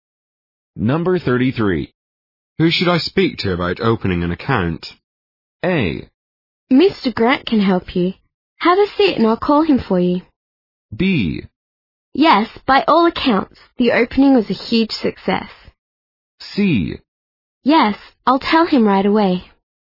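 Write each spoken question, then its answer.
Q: Who should I speak to about opening an account?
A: A: Mr. Grant can help you. Have a seat and I'll call him for you.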